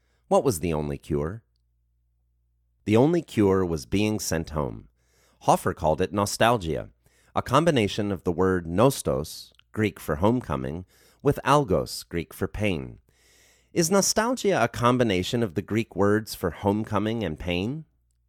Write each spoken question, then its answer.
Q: Is nostalgia a combination of the Greek words for homecoming and pain?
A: Yes, nostalgia is a combination of the Greek words for homecoming and pain.